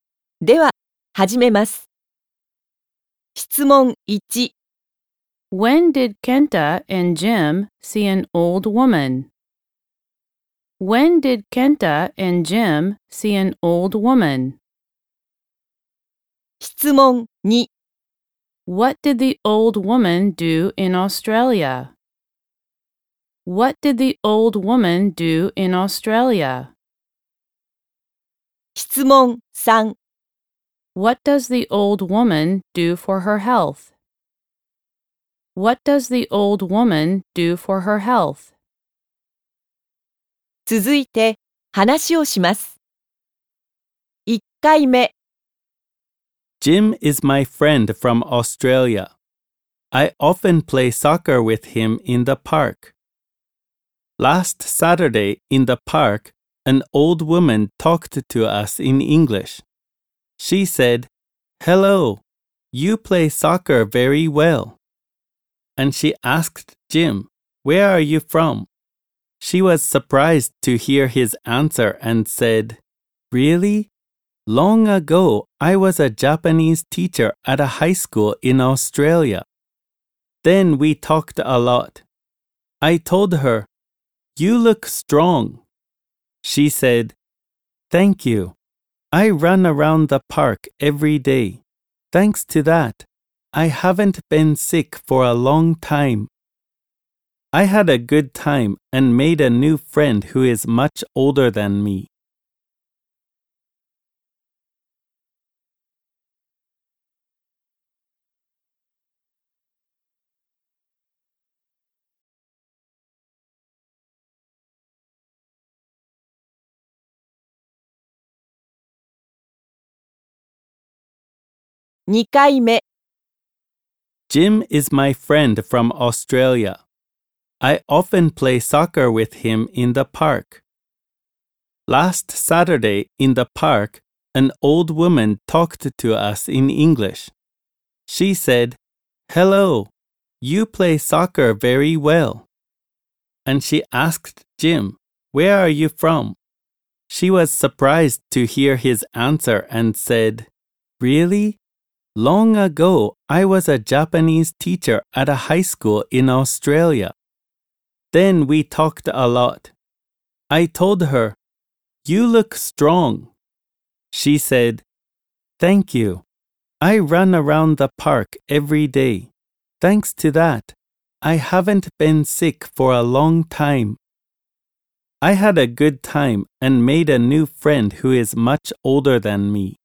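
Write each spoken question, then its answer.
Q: When did Kenta and Jim see an old woman?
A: Last Saturday

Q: What did the old woman do in Australia?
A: She was a Japanese teacher at a high school.

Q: What does the old woman do for her health?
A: She runs around the park every day.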